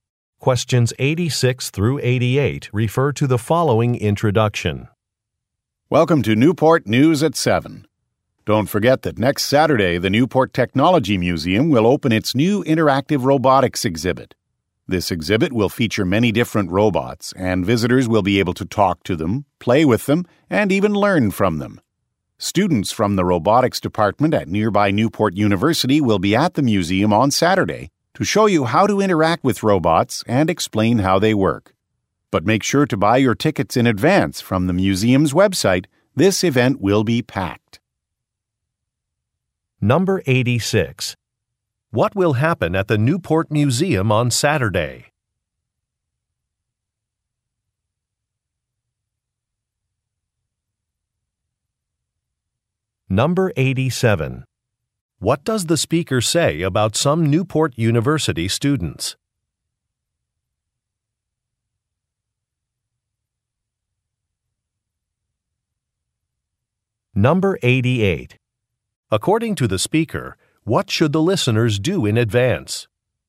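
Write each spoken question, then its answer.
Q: What will happen at the Newport Museum on Saturday?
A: A new interactive robotics exhibit will open

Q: What does the speaker say about some Newport University students?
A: They will show visitors how to interact with the robots

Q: According to the speaker, what should the listeners do in advance?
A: Buy tickets from the museum's website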